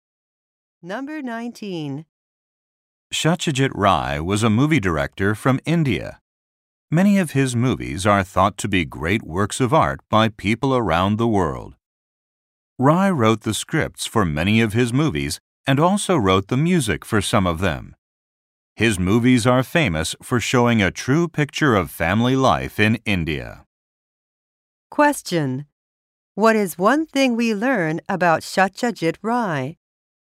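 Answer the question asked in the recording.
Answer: He wrote scripts and some music for his movies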